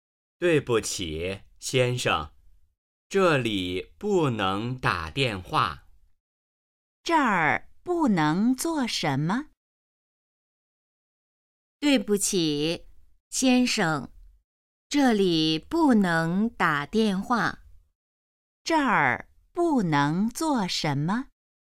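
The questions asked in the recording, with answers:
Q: 这儿不能做什么?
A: 打电话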